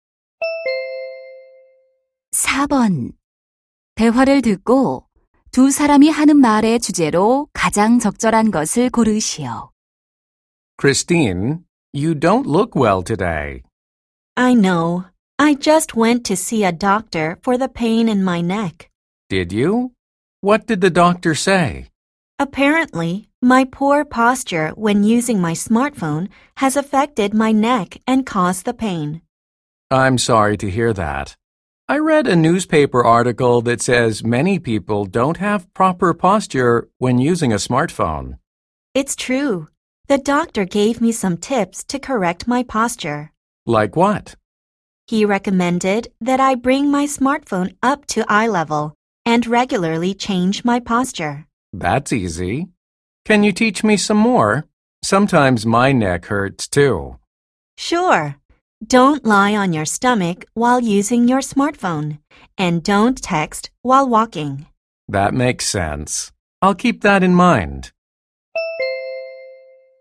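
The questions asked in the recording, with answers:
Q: 대화를 듣고 두 사람이 하는 말의 주제로 가장 적절한 것을 고르시오.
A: 스마트폰 사용 시 올바른 자세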